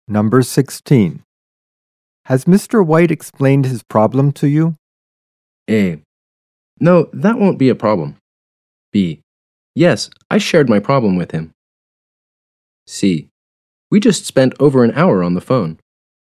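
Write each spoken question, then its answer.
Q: Has Mr. White explained his problem to you?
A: C: We just spent over an hour on the phone.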